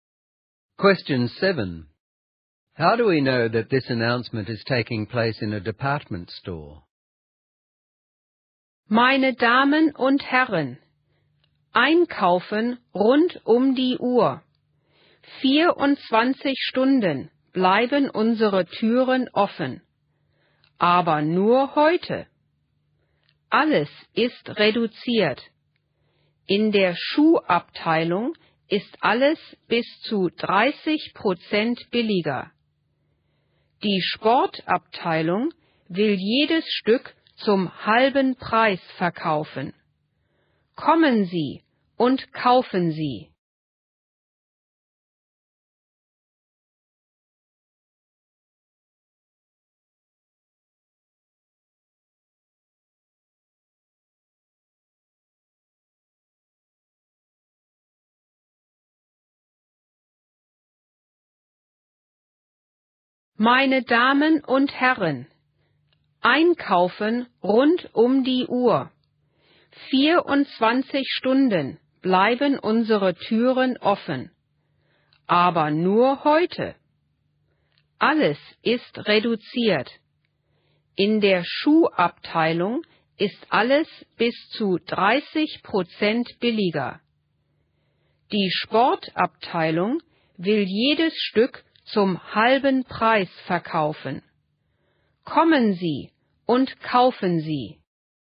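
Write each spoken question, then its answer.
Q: How do we know that this announcement is taking place in a department store?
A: It mentions different departments, such as the shoe department and the sports department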